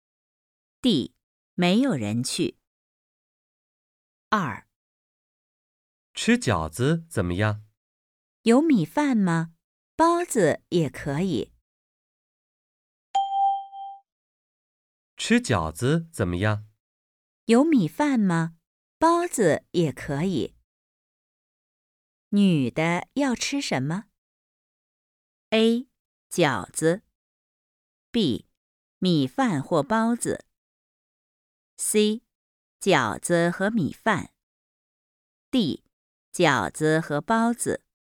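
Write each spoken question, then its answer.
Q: 女的要吃什么?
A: B: 米饭或包子。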